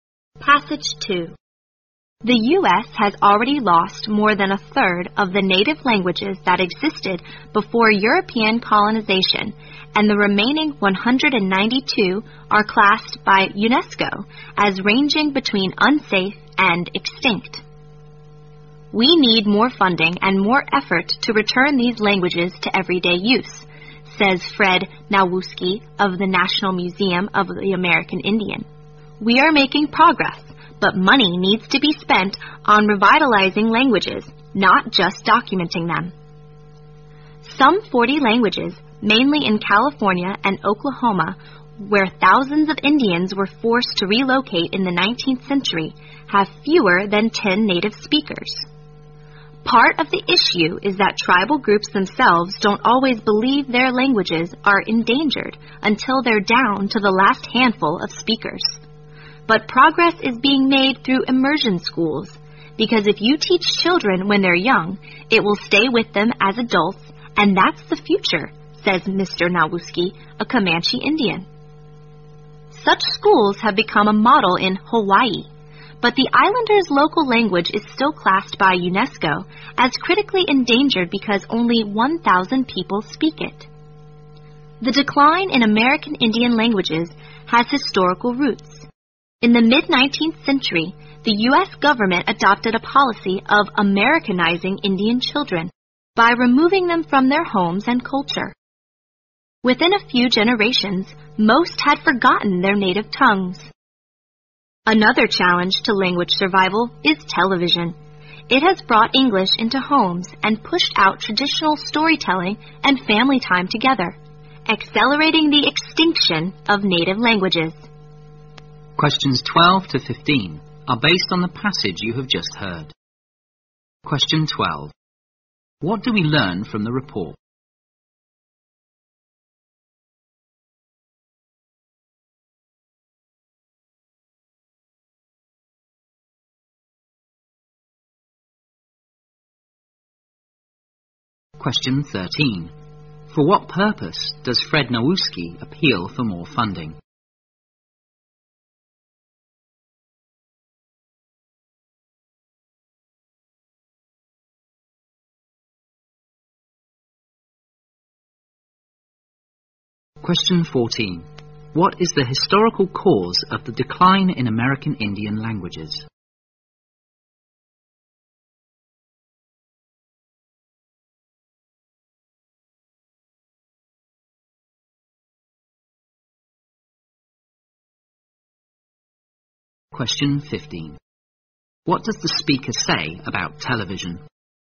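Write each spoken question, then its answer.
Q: For what purpose does Fred Nowuski appeal for more funding?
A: To bring native languages back into everyday use

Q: What is the historical cause of the decline in American Indian languages?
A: The government policy of Americanizing Indian children by taking them from their homes and culture

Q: What does the speaker say about television?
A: It has sped up the extinction of native languages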